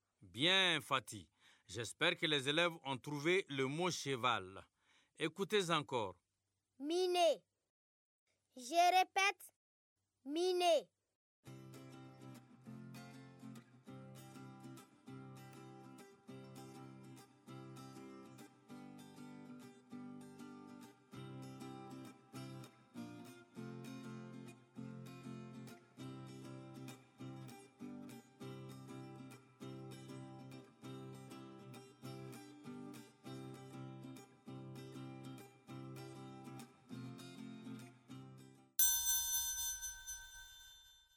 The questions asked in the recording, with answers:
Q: Miné. Je répète. Miné.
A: Cheminée.